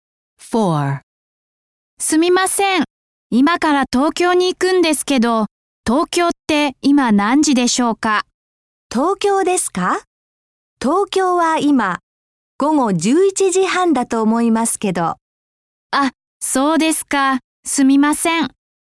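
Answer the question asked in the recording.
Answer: 午後11時半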